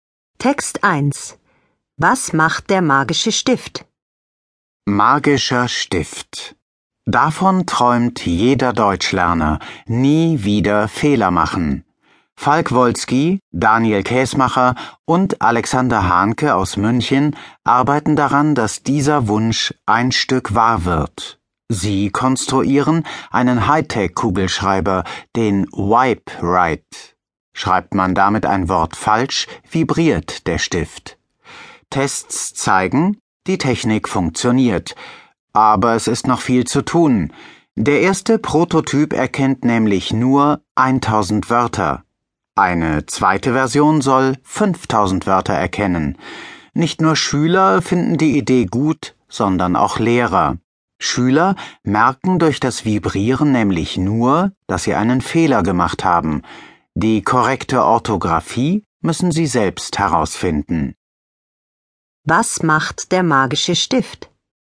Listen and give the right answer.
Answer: Er vibriert, wenn man damit ein Wort falsch schreibt.